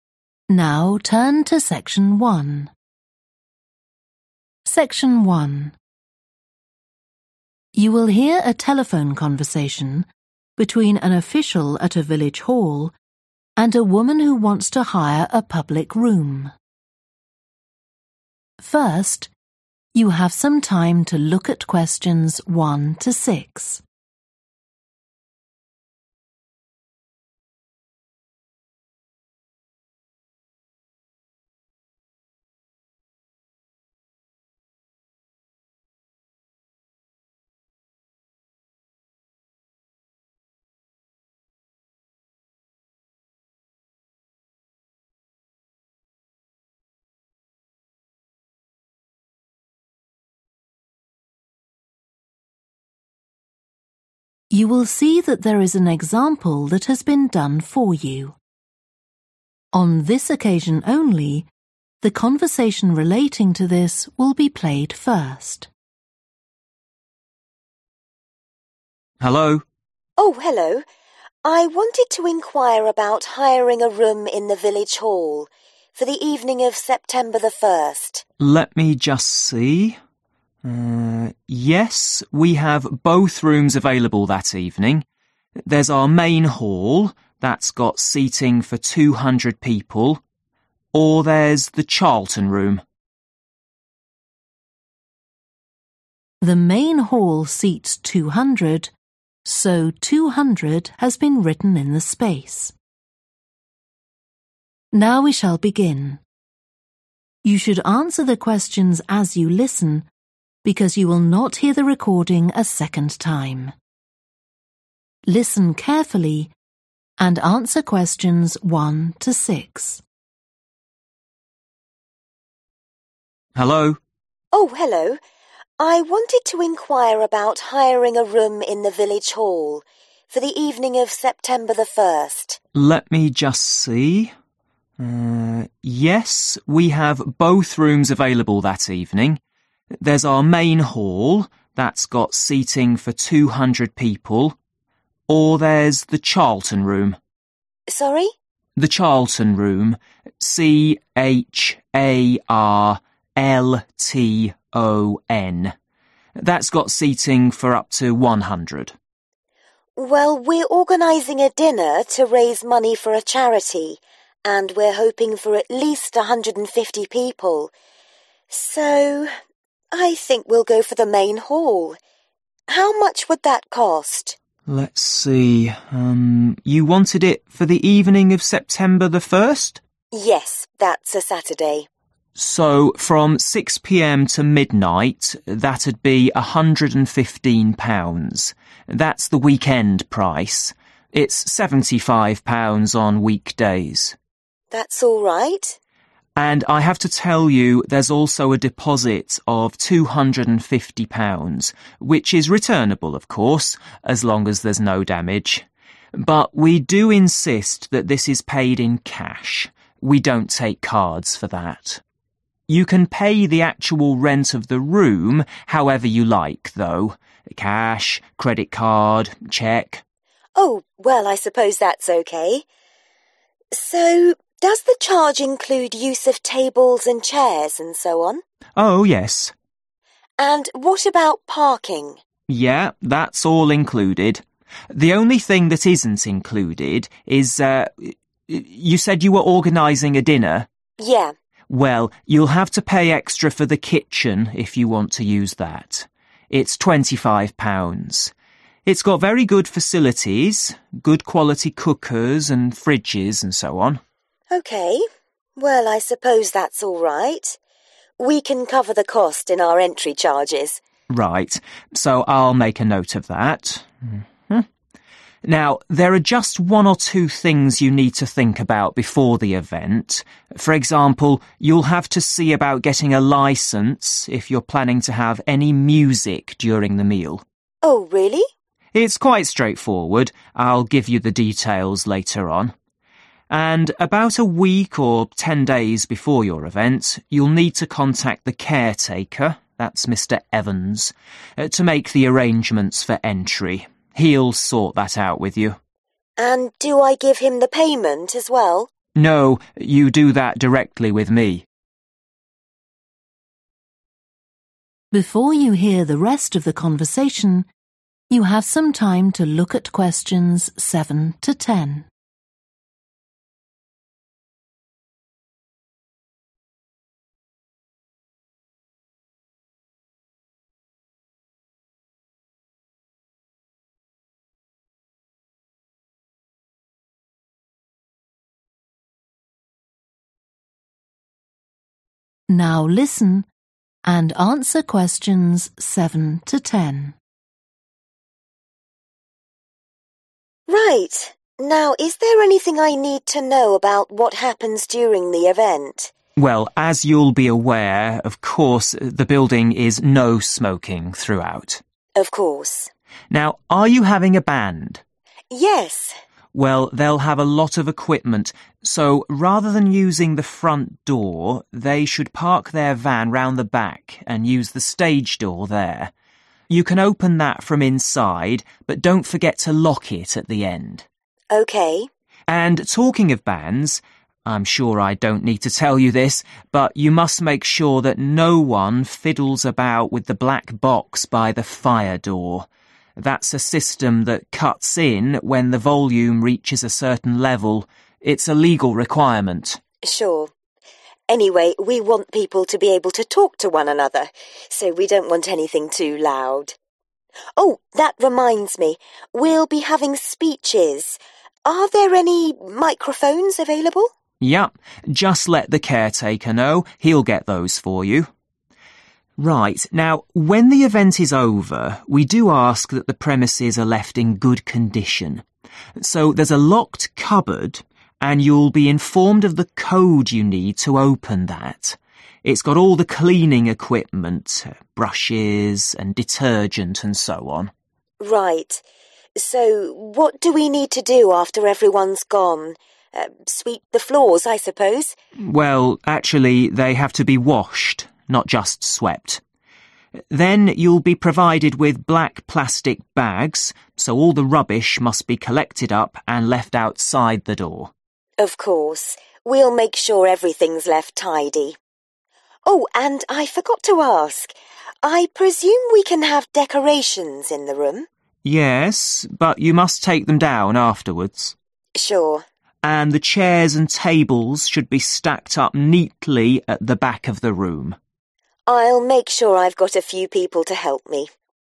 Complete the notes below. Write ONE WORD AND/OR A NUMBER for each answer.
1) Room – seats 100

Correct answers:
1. Charlton

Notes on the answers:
C-H-A-R-L-T-O-N. That's got seating for up to one hundred.

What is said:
OFFICIAL: Hello?
WOMAN: Oh, hello. I wanted to enquire about hiring a room in the Village Hall, for the evening of September the first.
OFFICIAL: Let me just see ... Yes, we have both rooms available that evening. There's our Main Hall – that's got seating for (Example) 200 people. Or there's the Charlton Room ...
WOMAN: Sorry?
OFFICIAL: The Charlton Room – (Q1) C-H-A-R-L-T-O-N.
WOMAN: Well, we're organizing a dinner to raise money for a charity, and we're hoping for at least 150 people, so I think we'll go for the Main Hall. How much would that cost?
WOMAN: Yes, that's a Saturday.
OFFICIAL: So from six pm to midnight that'd be (Q2) £115 – that's the weekend price, it's £75 on weekdays.
WOMAN: That's all right.
OFFICIAL: And I have to tell you there's also a deposit of £250, which is returnable of course as long as there's no damage. But we do insist that this is (Q3) paid in cash (trả bằng tiền mặt), we don't take cards for that. You can pay the actual rent of the room however you like though – cash, credit card, cheque ...
WOMAN: Oh, well I suppose that's OK. So does the charge (=cost) include use of tables and chairs and so on?
OFFICIAL: Oh, yes.
OFFICIAL: Yeah, that's all included. you said you were organizing a dinner?
WOMAN: Yeah.
OFFICIAL: Well, you'll have to pay extra for the kitchen if you want to use that. It's £25. It's got very good facilities – good quality cookers and fridges and so on.
We can cover the cost in our entry charges.
OFFICIAL: Right. So I'll make a note of that. Now there are just one or two things you need to think about before the event. For example, (Q5) you'll have to see about getting a licence if you're planning to have any music during the meal.
WOMAN: Oh, really?
OFFICIAL: It's quite straightforward, I'll give you the details later on. And about a week or ten days before your event you'll need to contact the caretaker, that's Mr Evans, (Q6) to make the arrangements for entry (để sắp xếp việc đón tiếp) – he'll sort that out with you.
WOMAN: And do I give him the payment as well?
OFFICIAL: No, you do that directly with me.
WOMAN: Right. Now is there anything I need to know about what happens during the event?
OFFICIAL: Well, as you'll be aware, of course the building is no smoking throughout.
WOMAN: Of course.
OFFICIAL: Now, are you having a band?
WOMAN: Yes.
OFFICIAL: Well, they'll have a lot of equipment, so rather than using the front door they should (Q7) park their van round the back and use the stage door there (họ đỗ xe ở phía sau và sử dụng cửa sân khấu ở đó). You can open that from inside but don't forget to lock it at the end.
WOMAN: OK.
OFFICIAL: And talking of bands, I'm sure I don't need to tell you this, but you must make sure that no one fiddles about with the black box by the fire door – that's a system that cuts in when the volume reaches a certain level. It's a legal requirement.
WOMAN: Sure. Anyway, we want people to be able to talk to one another so we don't want anything too loud. Oh, that reminds me, we'll be having speeches – are there any microphones available?
OFFICIAL: Yeah. Just let the caretaker know, he'll get those for you. Right, now when the event is over we do ask that the premises are left in good condition. So (Q8) there's a locked cupboard and you'll be informed of the code you need to open that.
WOMAN: Right. So what do we need to do after everyone's gone? Sweep the floors I suppose?
OFFICIAL: (Q9) Well, actually they have to be washed, not just swept. (Thực ra bạn cần lau sàn chứ không chỉ đơn thuần là quét) Then you'll be provided with black plastic bags, so all the rubbish must be collected up and left outside the door.
WOMAN: Of course. We'll make sure everything's left tidy. Oh, and I forgot to ask, I presume we can have decorations in the room?
OFFICIAL: (Q10) Yes, but you must take them down afterwards.
WOMAN: Sure.
OFFICIAL: And the chairs and tables should be stacked up neatly at the back of the room
WOMAN: I'll make sure I've got a few people to help me.